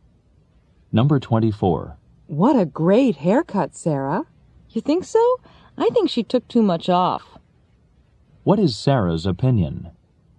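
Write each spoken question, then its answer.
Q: What is Sarah's opinion?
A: Her hair was cut too short.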